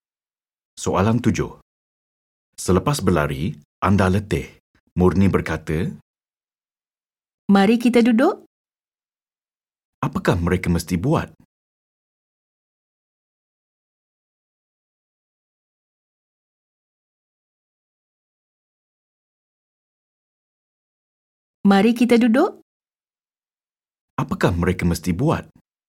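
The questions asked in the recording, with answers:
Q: Apakah mereka mesti buat?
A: duduk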